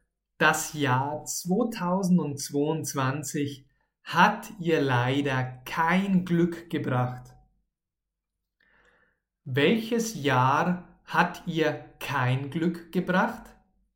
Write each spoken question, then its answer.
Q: Welches Jahr hat ihr kein Glück gebracht?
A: das Jahr 2022 oder 2022. Dieses Jahr hat ihr kein Glück gebracht.